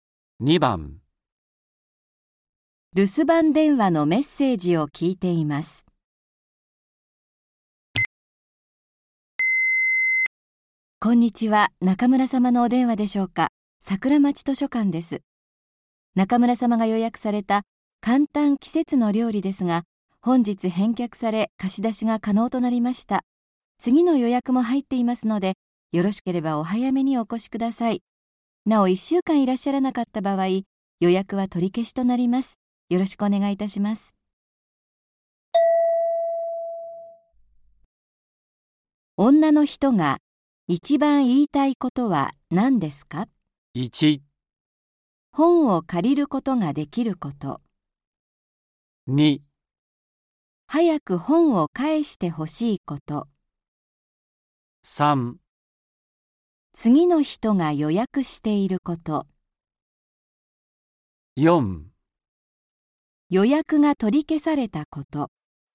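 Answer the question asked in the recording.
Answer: 1: 本を借りることができること。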